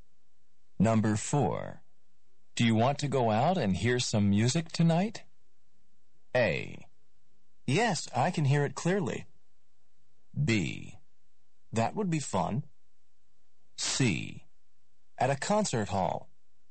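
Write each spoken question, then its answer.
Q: Do you want to go out and hear some music tonight?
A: B: That would be fun.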